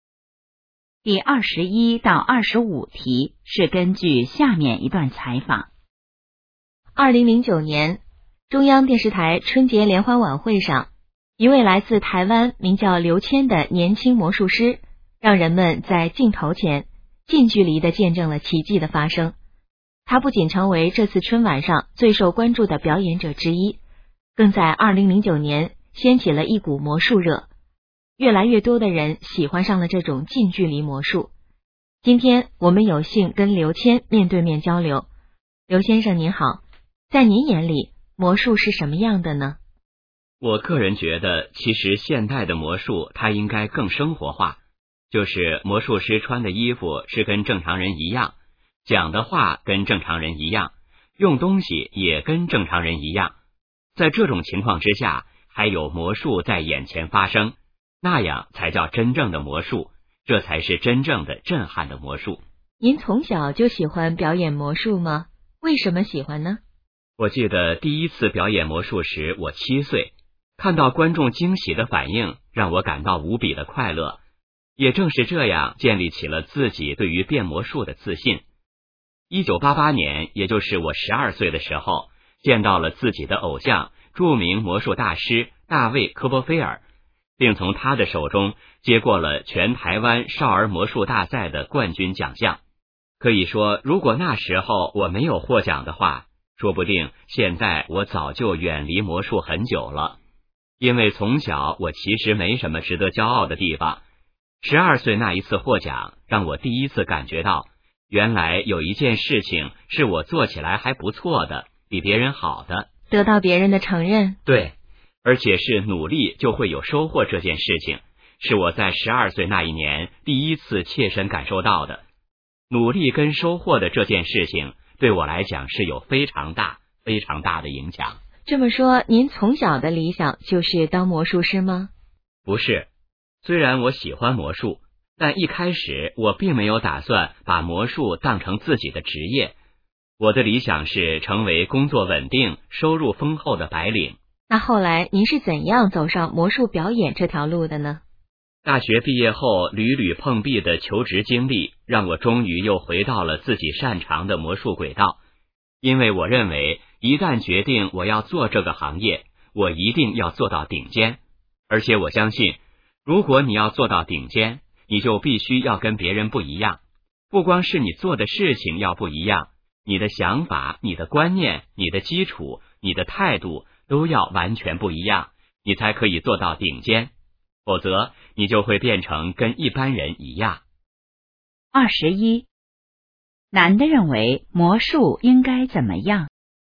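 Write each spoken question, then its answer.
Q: 男的认为魔术应该怎么样?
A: 应该更生活化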